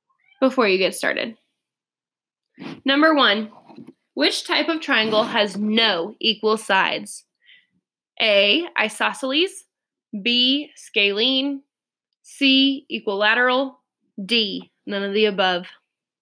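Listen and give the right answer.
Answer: B: Scalene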